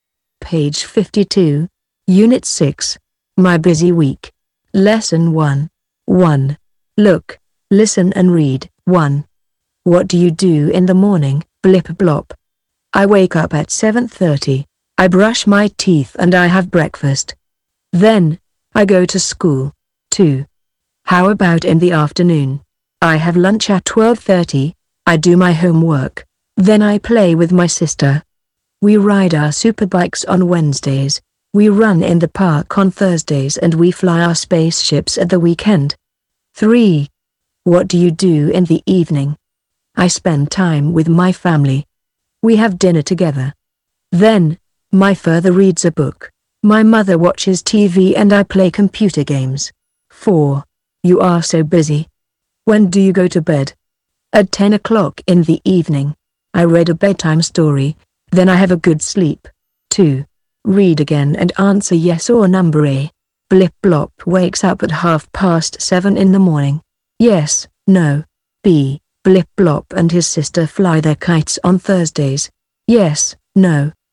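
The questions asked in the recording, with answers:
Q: Blip Blop wakes up at 7:30 in the morning.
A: Yes

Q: Blip Blop and his sister fly their kites on Thursdays.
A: No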